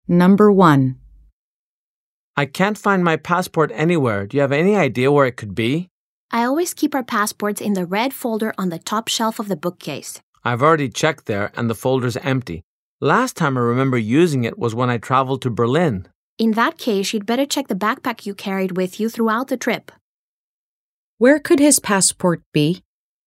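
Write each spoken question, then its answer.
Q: Where could his passport be?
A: In the backpack he carried on his trip to Berlin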